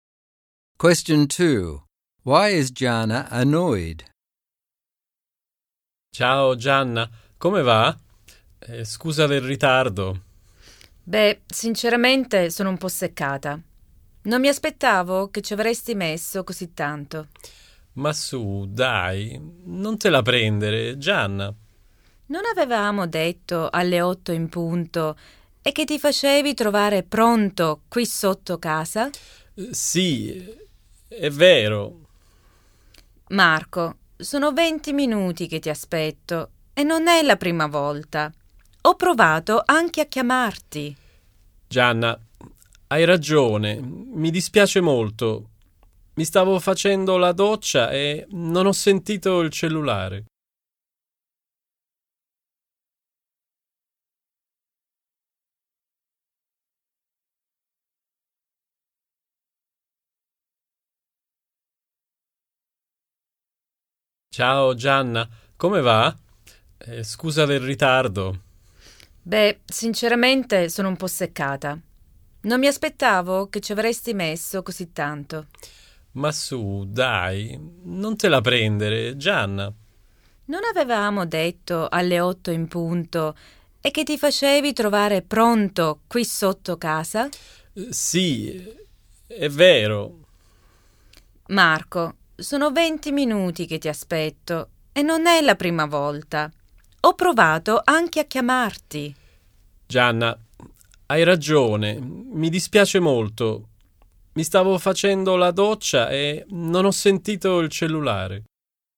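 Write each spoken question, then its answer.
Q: Why is Gianna annoyed?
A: Marco is 20 minutes late, it isn't the first time, and he didn't answer her calls.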